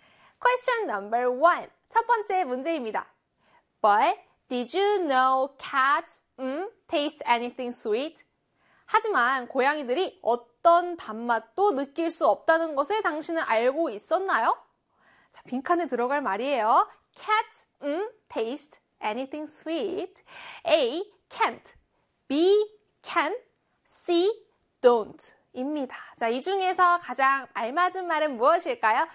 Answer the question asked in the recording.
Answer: 네, 바로 A의 can't가 되겠죠.